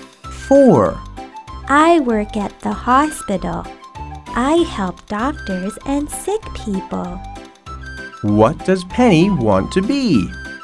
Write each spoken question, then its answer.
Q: What does Penny want to be?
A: She wants to be a nurse.